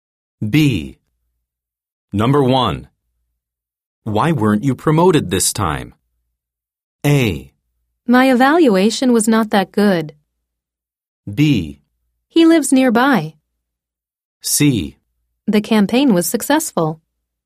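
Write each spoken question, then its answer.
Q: Why weren't you promoted this time?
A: A: My evaluation was not that good.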